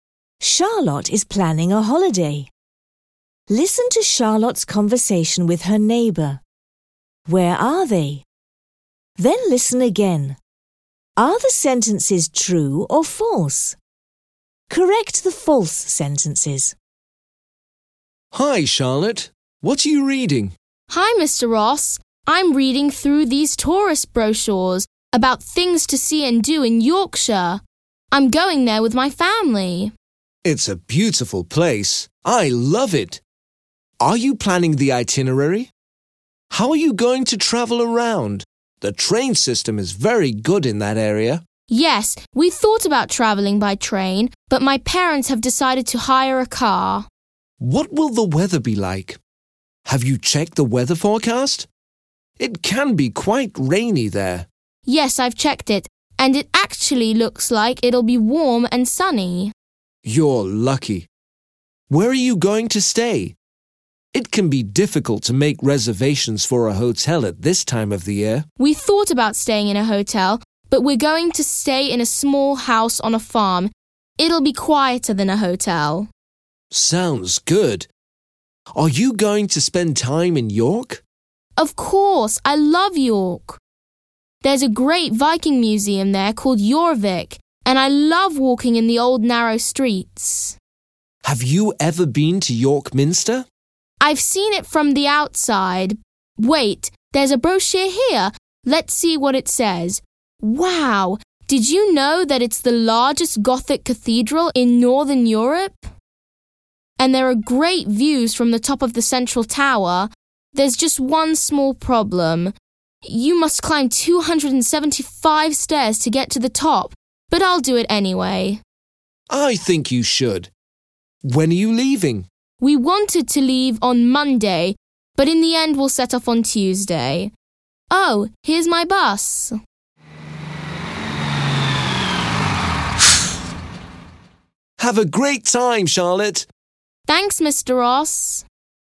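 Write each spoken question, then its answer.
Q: Where are they?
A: At a bus stop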